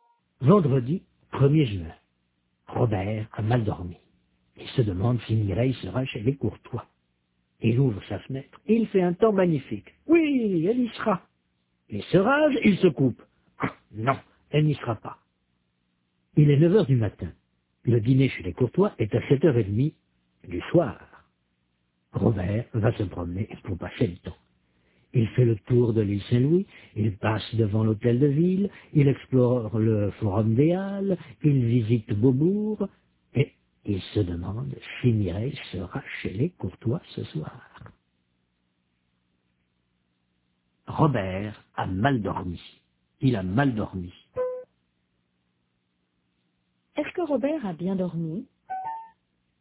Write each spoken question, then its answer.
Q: Est-ce que Robert a bien dormi?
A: Non, il a mal dormi.